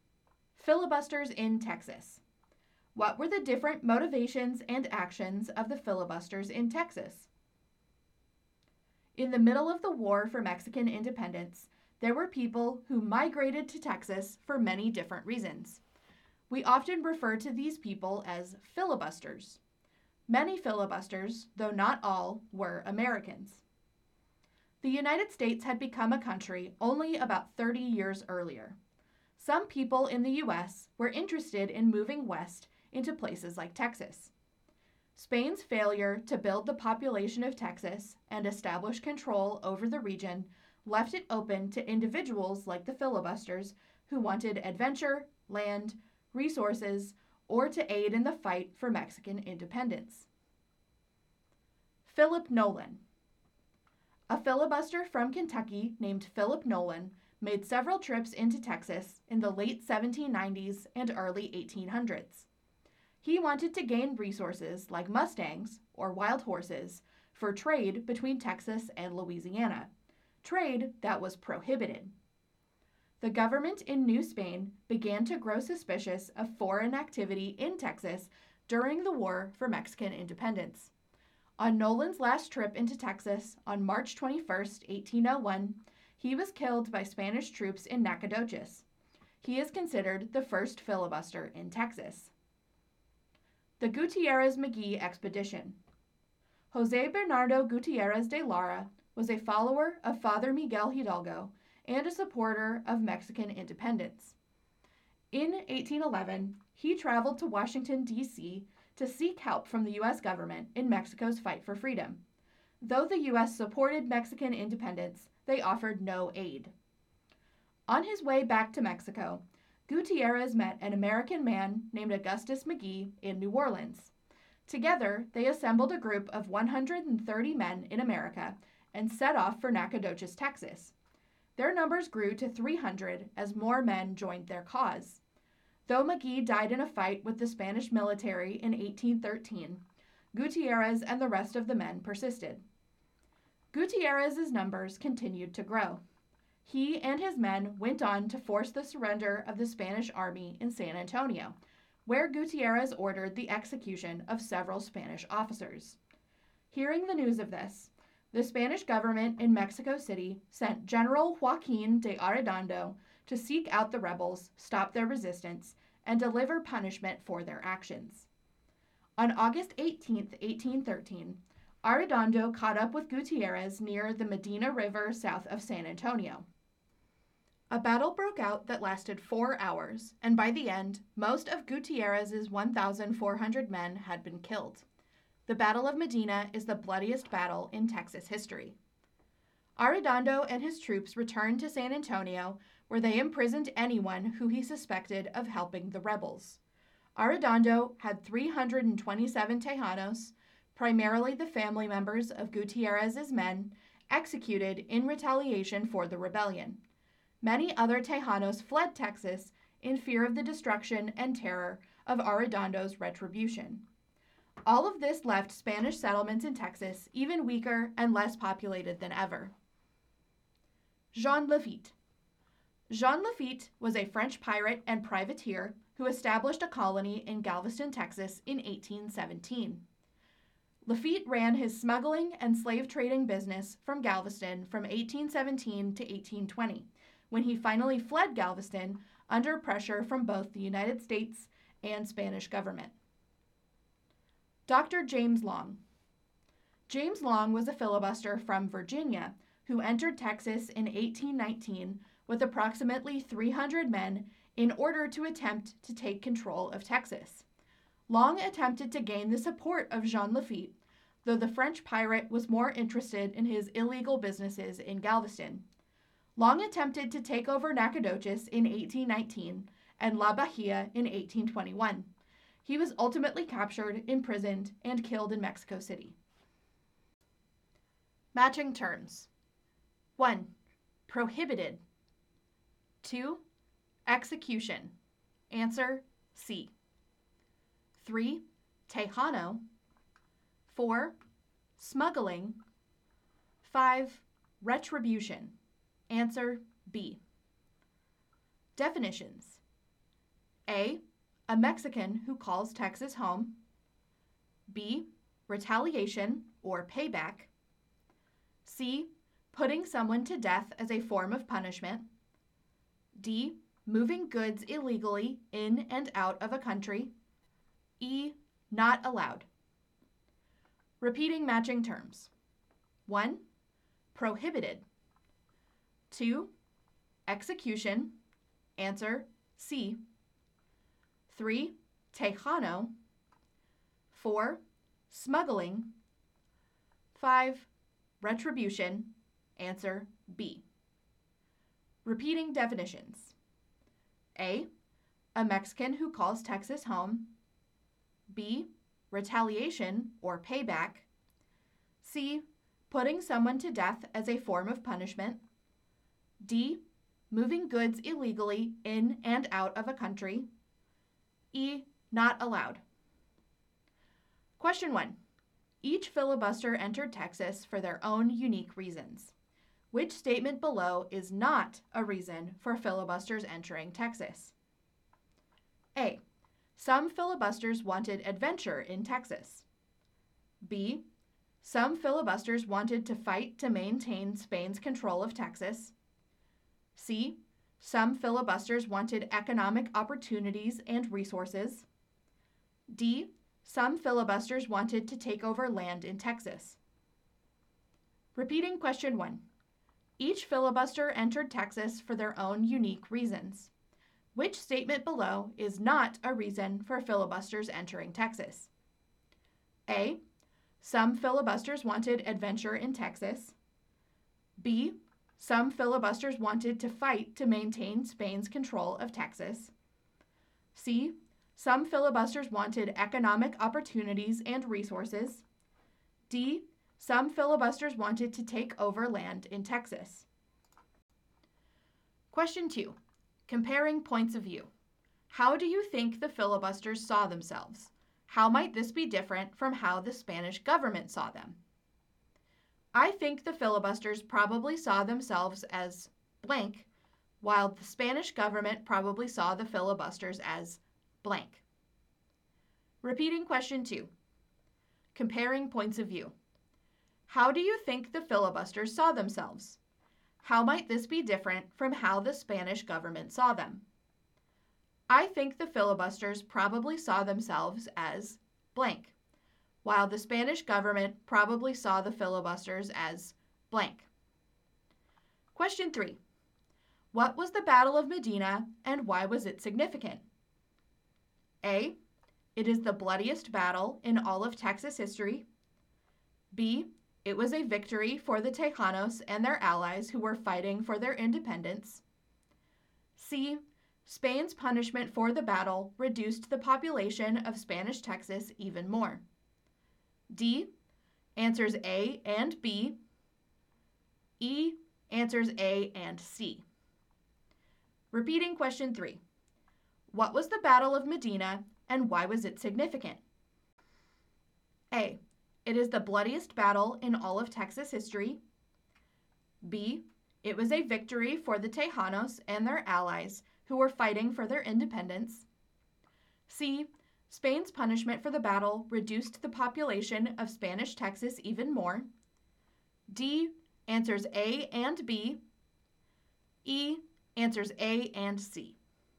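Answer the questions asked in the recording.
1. B: Some filibusters wanted to fight to maintain Spain's control of Texas.
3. E: Answers A and C.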